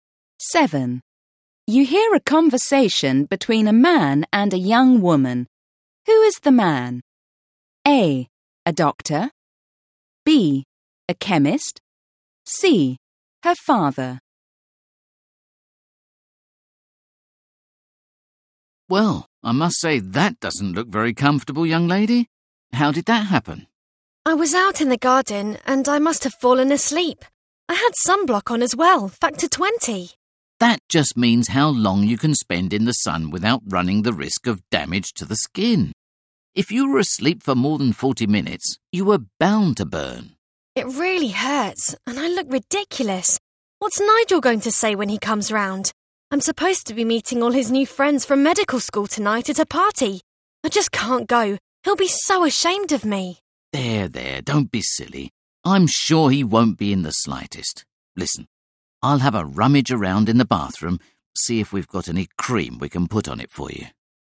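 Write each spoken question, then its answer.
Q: Who is the man?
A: C: Her father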